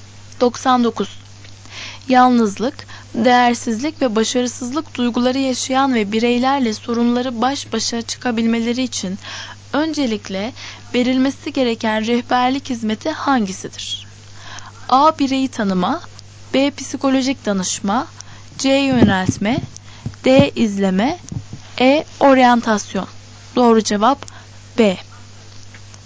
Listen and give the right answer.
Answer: Doğru cevap B.